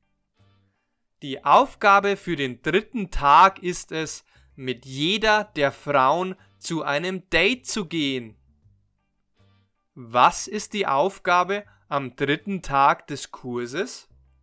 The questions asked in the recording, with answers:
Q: Was ist die Aufgabe am dritten Tag des Kurses?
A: Die Aufgabe für den dritten Tag ist es, mit jeder der Frauen zu einem Date zu gehen.